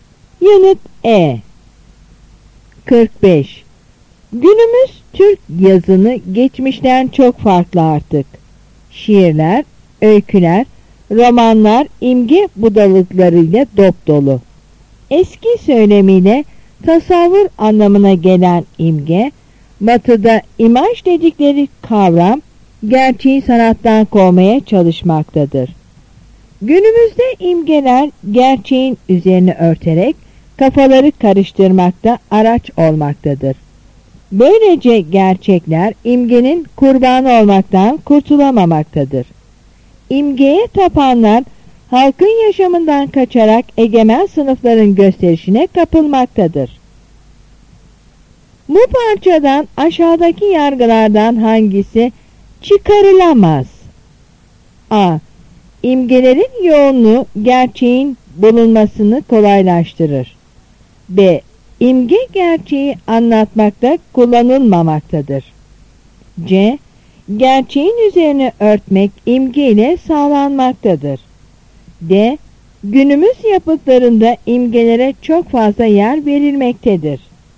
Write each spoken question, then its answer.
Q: Bu parçadan aşağıdaki yargılardan hangisi çıkarılamaz?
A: Yanıt A.